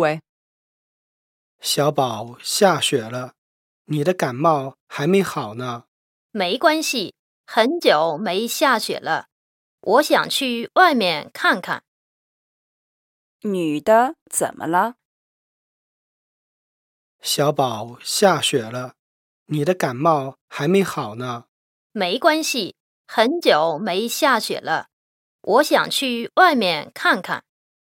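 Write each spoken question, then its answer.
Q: 女的怎么了?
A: 感冒还没好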